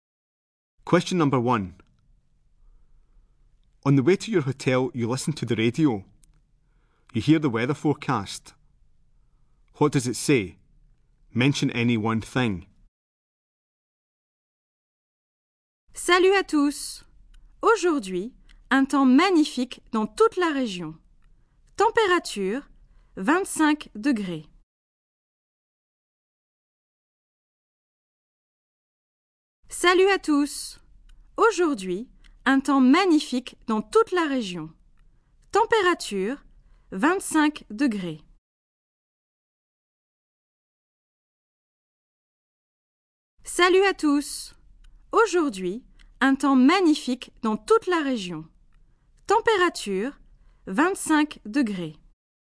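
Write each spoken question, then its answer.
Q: What does it say? Mention any one thing.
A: Lovely weather in the whole region; temperature 25 degrees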